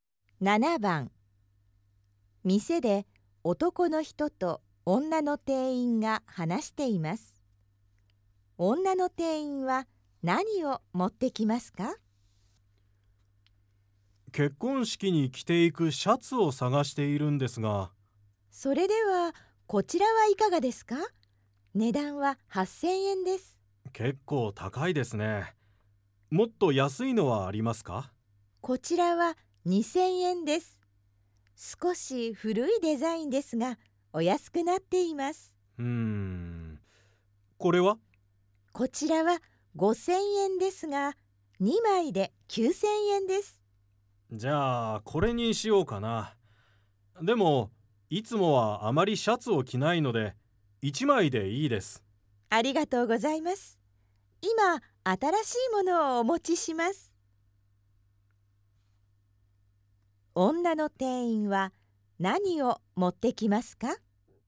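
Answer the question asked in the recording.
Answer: 5000円のシャツ1枚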